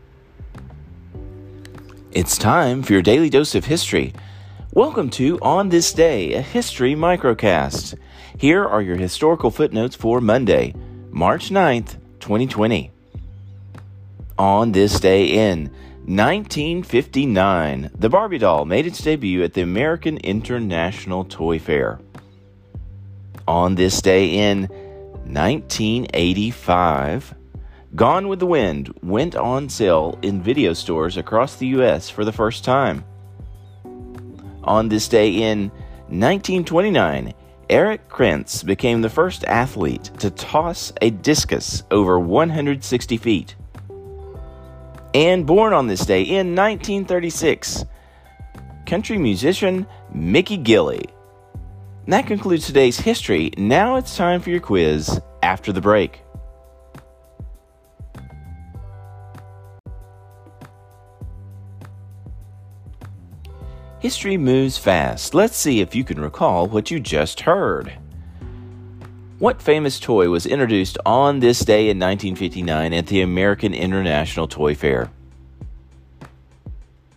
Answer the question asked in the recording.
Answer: the Barbie doll.